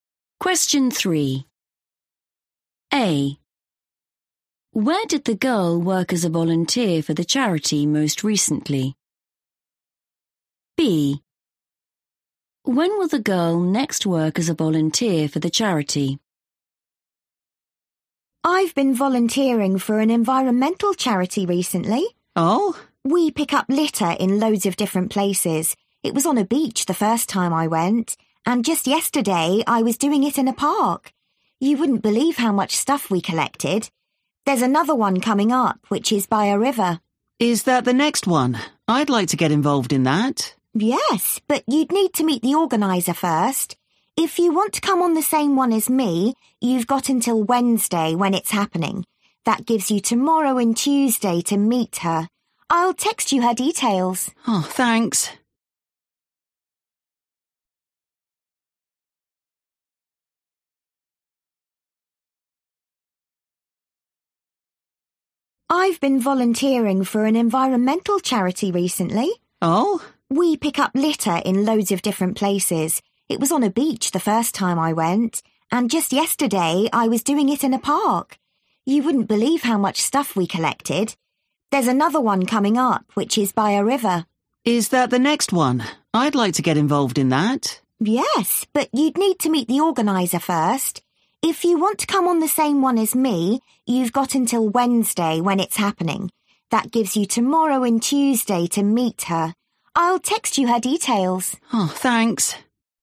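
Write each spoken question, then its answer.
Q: Where did the girl work as a volunteer for the charity most recently?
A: in a park

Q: When will the girl next work as a volunteer for the charity?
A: Wednesday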